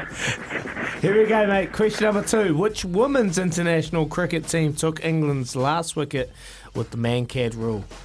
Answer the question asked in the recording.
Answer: India is correct.